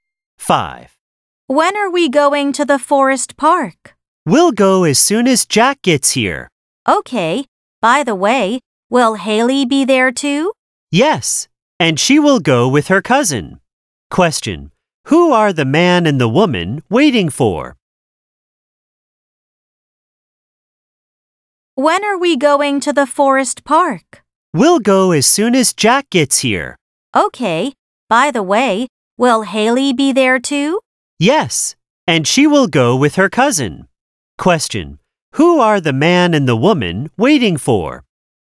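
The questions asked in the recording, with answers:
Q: Who are the man and the woman waiting for?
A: Jack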